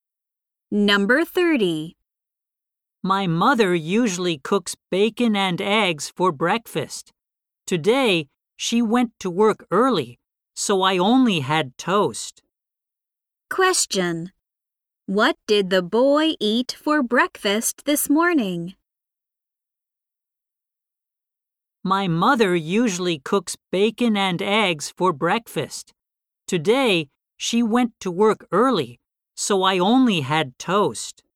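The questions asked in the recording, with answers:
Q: What did the boy eat for breakfast this morning?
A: Toast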